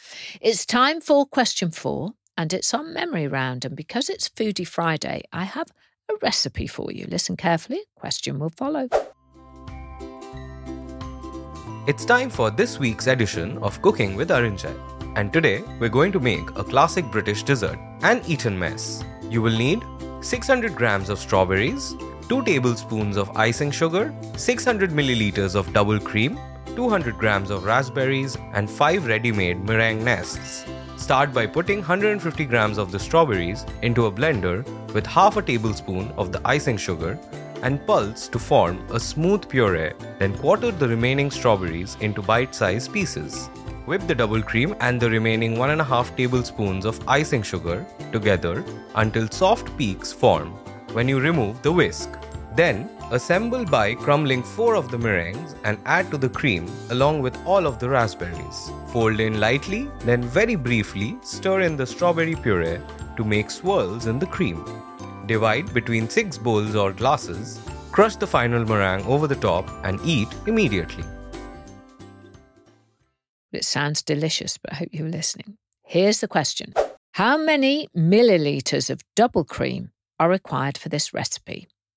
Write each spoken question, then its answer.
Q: How many milliliters of double cream are required for this recipe?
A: And the answer was 600 milliliters.